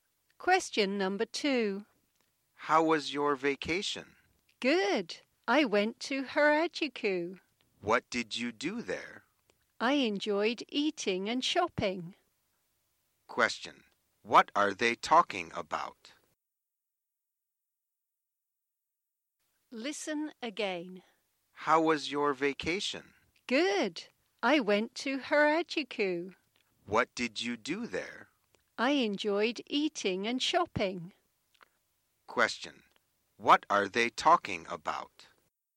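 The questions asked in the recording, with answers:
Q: What are they talking about?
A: A vacation (a trip to Harajuku)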